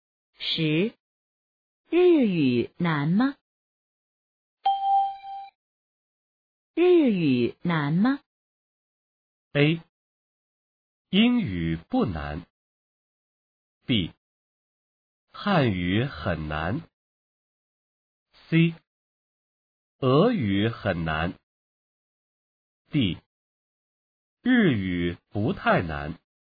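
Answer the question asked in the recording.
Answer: D: 日语不太难。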